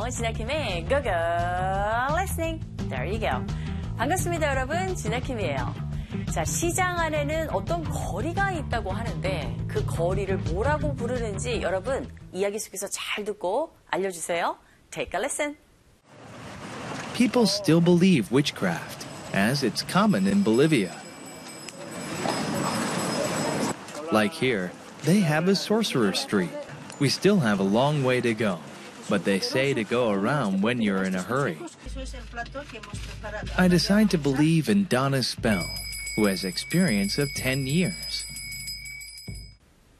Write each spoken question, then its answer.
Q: 자, 시장 안에는 어떤 거리가 있다고 하는데 그 거리를 뭐라고 부르는지 여러분 이야기 속에서 잘 듣고 알려주세요.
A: Sorcerer Street, 이게 뭘까요?